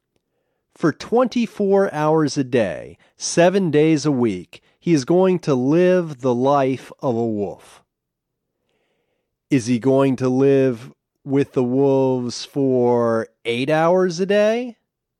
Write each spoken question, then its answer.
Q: Is he going to live with the wolves for 8 hours a day?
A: No, he's not going to live with them for 8 hours.